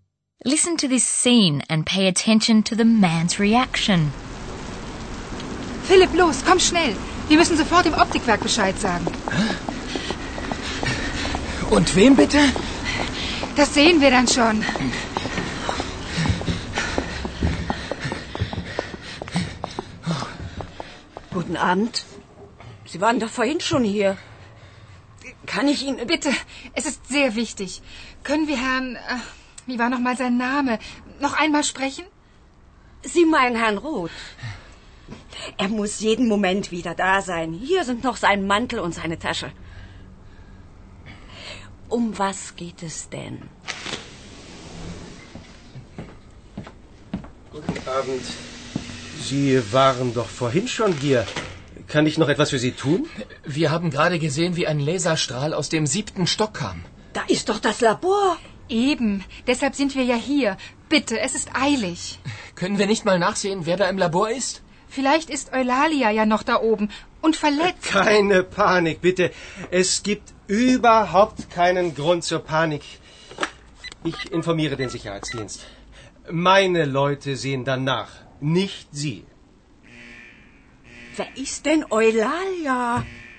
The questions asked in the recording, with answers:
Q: Listen to this scene and pay attention to the man's reaction.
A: The man reacts calmly, or at least he pretends to be calm.